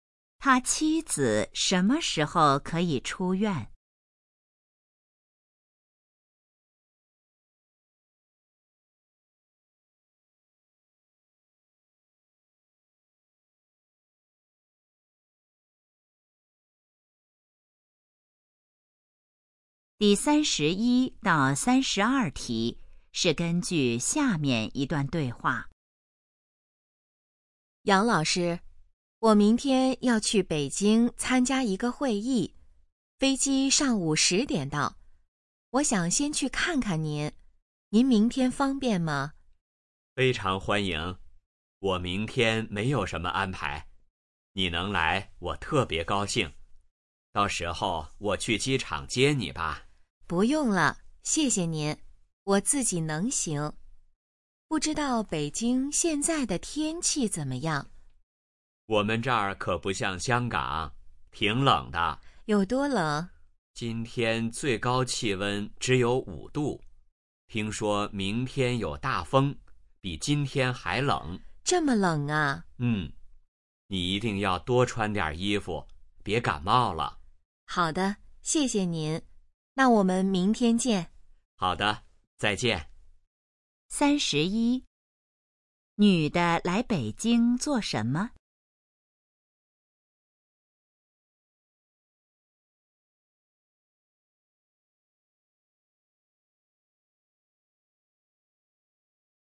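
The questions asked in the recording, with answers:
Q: 女的来北京做什么?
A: 参加会议

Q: 明天天气怎么样?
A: 有大风,比今天还冷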